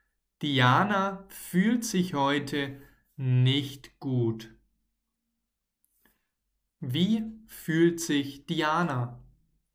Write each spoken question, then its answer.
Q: Wie fühlt sich Diana?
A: Nicht gut. Diana fühlt sich nicht gut.